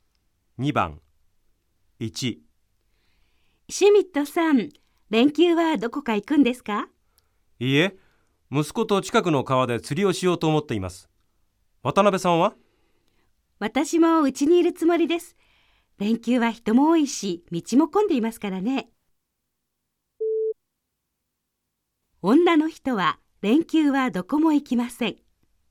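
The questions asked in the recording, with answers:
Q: 女の人は連休はどこも行きません。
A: ○(正しい)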